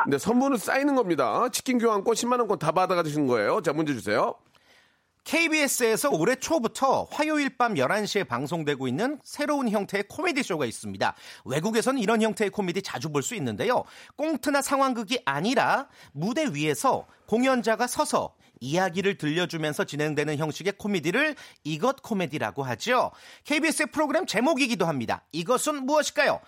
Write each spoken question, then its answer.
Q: KBS의 프로그램 제목이기도 합니다. 이것은 무엇일까요?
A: 정답. 오케이.